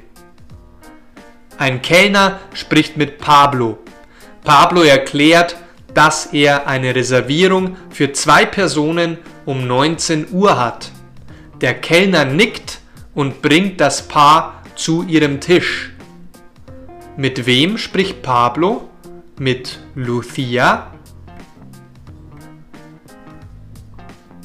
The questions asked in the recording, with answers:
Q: Mit wem spricht Pablo? Mit Lucia?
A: Nein, Pablo spricht nicht mit Lucia, er spricht mit einem Kellner.